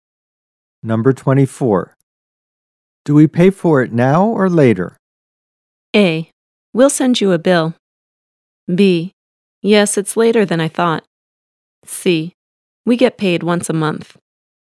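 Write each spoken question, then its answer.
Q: Do we pay for it now or later?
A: A: We'll send you a bill.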